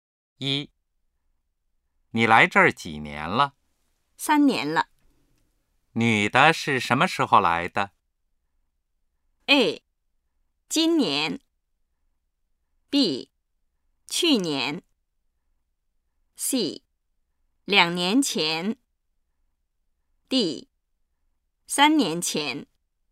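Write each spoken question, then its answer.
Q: 女的是什么时候来的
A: D:3年前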